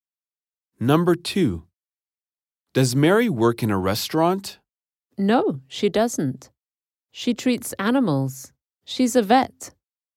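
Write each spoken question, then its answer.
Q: Does Mary work in a restaurant?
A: No, she's a vet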